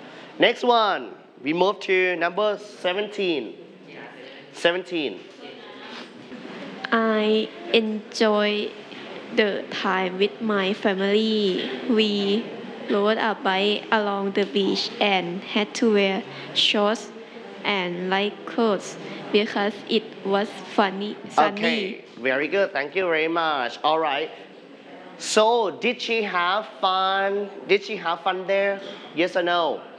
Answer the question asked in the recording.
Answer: Yes, she had fun there.